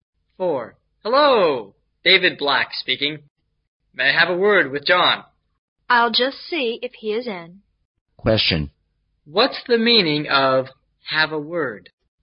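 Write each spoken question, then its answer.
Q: What's the meaning of have a word?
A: To talk briefly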